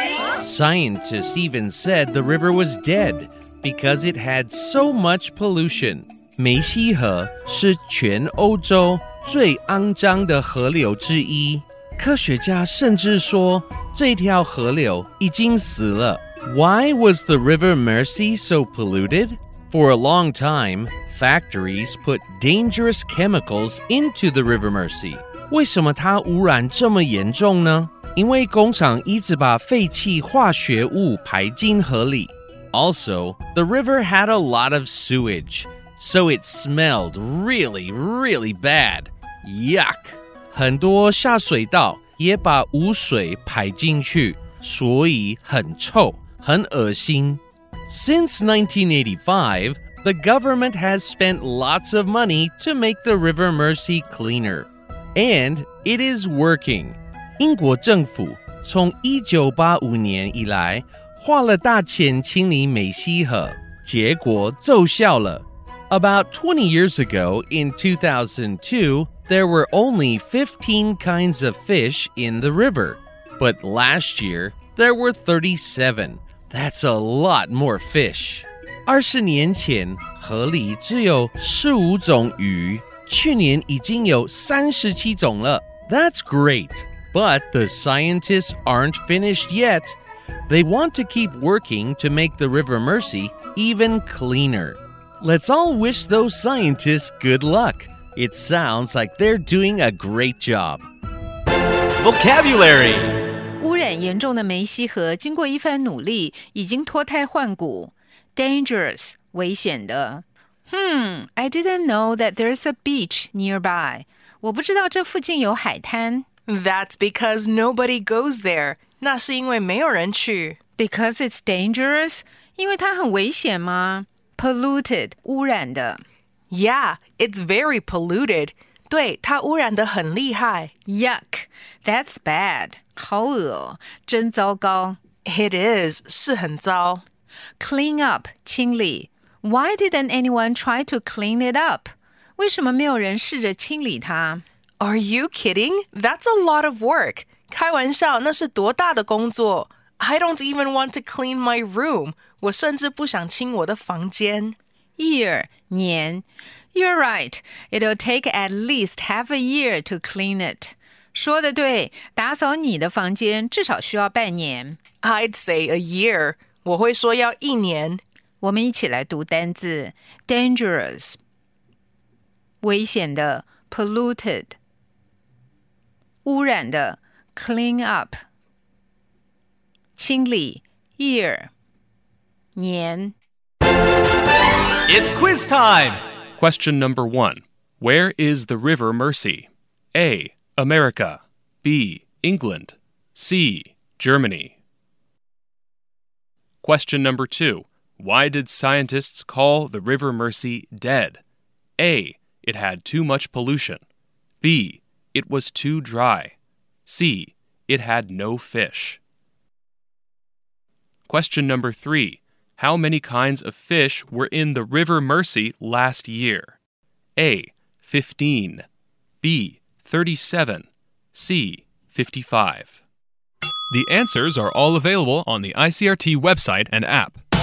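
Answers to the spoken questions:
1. B: England
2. A: It had too much pollution.
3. B: 37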